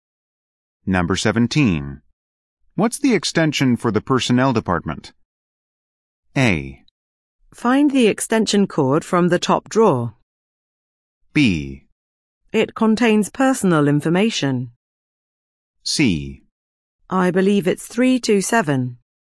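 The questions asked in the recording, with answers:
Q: What's the extension for the personnel department?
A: C: I believe it's 327.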